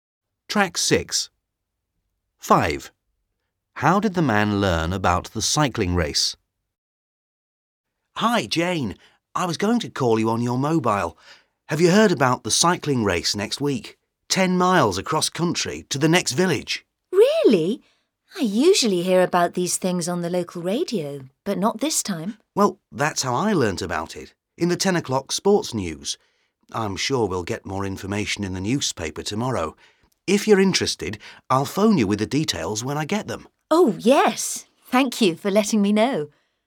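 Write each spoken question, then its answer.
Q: How did the man learn about the cycling race?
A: On the local radio (the 10 o'clock sports news)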